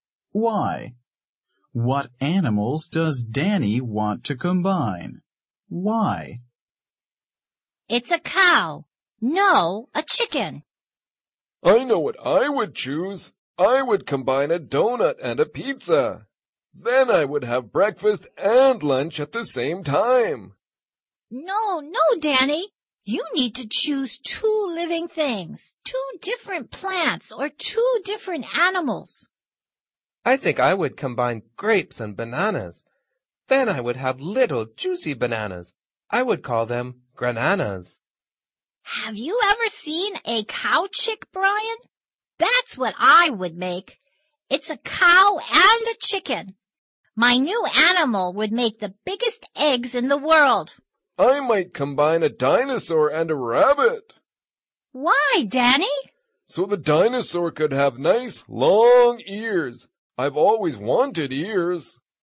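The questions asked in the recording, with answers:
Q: What animals does Danny want to combine?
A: A dinosaur and a rabbit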